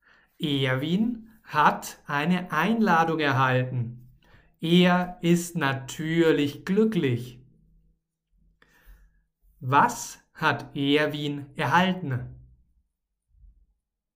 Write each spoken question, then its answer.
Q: Was hat Erwin erhalten?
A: Eine Einladung. Erwin hat eine Einladung erhalten.